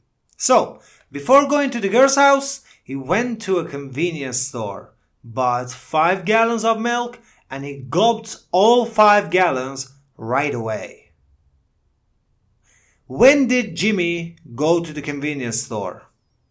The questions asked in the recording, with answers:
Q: When did Jimmy go to the convenience store?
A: Yes, before going to the girl's house.